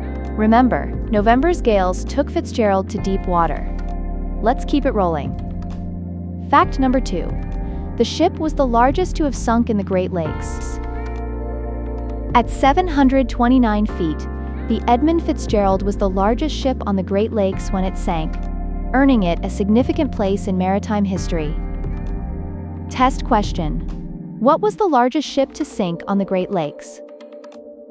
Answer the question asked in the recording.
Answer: Edmund Fitzgerald.